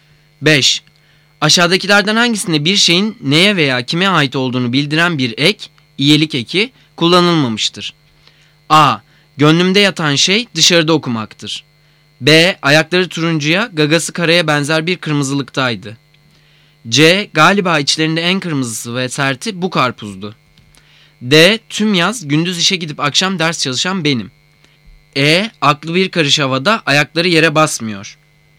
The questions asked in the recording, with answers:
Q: Aşağıdakilerden hangisinde bir şeyin neye veya kime ait olduğunu bildiren bir ek, iyilik eki, kullanılmamıştır.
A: Cevap D. Tüm yaz gündüz işe gidip akşam ders çalışan benim.